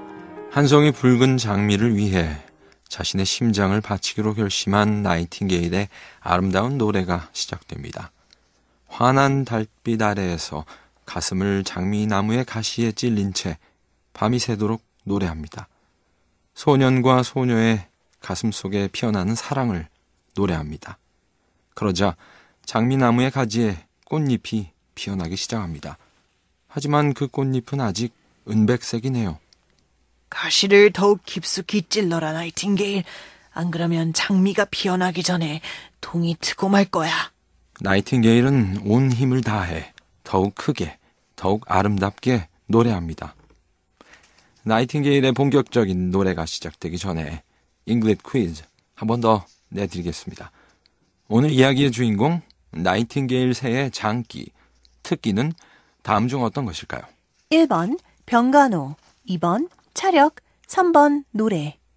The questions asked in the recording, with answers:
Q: 오늘 이야기의 주인공, 나이팅게일 새의 장기, 특기는 다음 중 어떤 것일까요?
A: 이 나이팅게일의 장기는 바로 노래였죠.